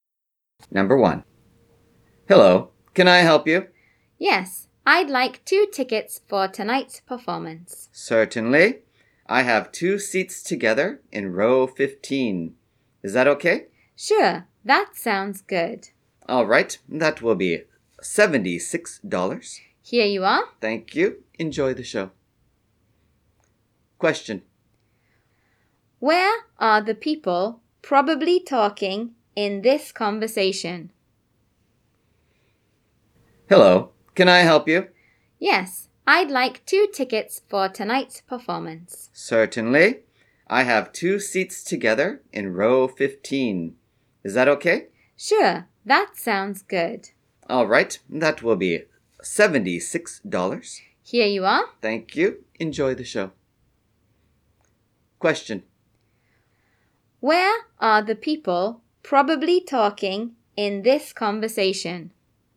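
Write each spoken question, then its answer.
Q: Where are the people probably talking in this conversation?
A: At a theater ticket counter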